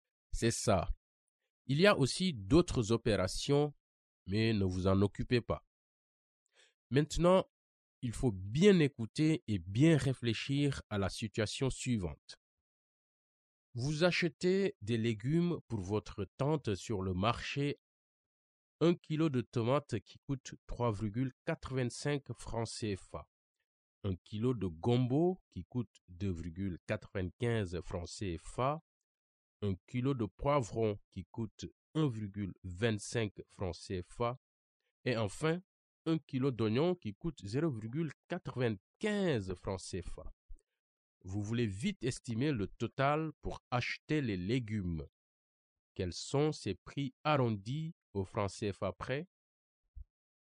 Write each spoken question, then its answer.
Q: Quels sont ces prix arrondis au franc CFA près?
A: On arrondit 3,85 à 4. On arrondit 2,95 à 3.